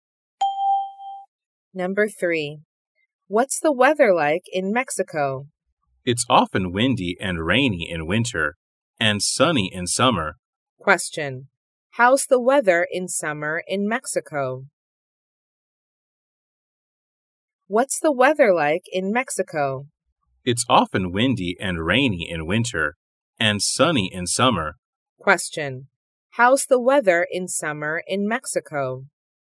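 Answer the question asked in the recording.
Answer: Sunny.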